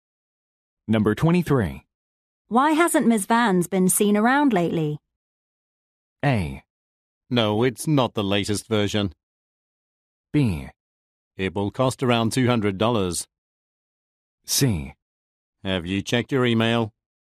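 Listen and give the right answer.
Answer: C: Have you checked your email?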